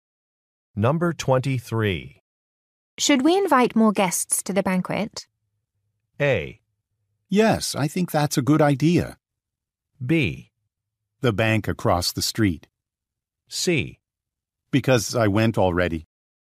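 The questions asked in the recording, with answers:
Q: Should we invite more guests to the banquet?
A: A: Yes, I think that's a good idea.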